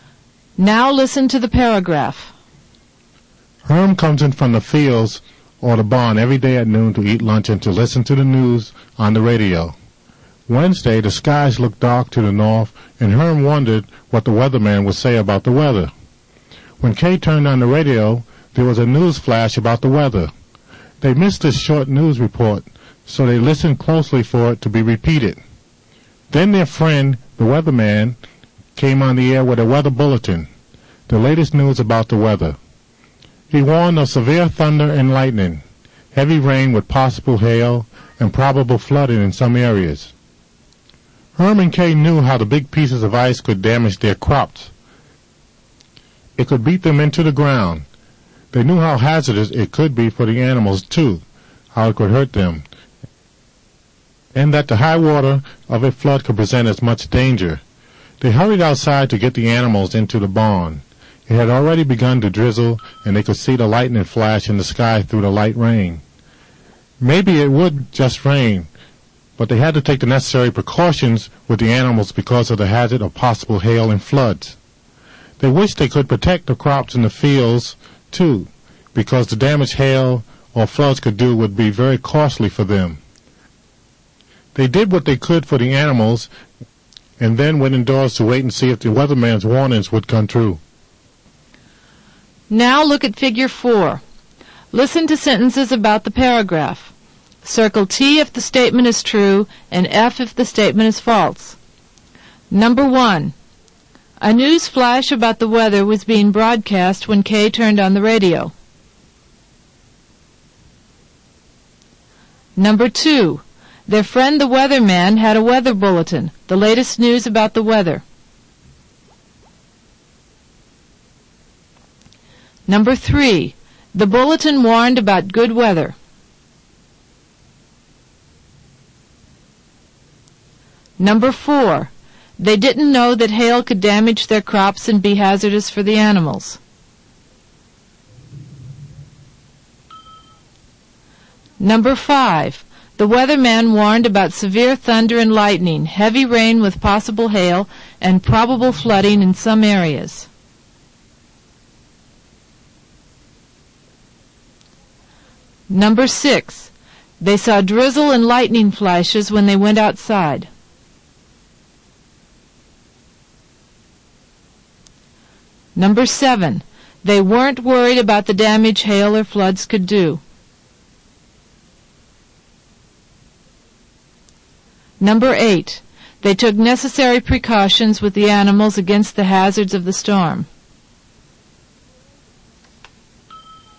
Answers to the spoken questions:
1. Number 1 is true.
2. Number 2 is true.
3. Number 3 is false. The bulletin didn't warn of good weather.
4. Number 4 is false.
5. Number 5 is true.
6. Number 6 is true.
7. Number 7 is false.
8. Number 8 is true.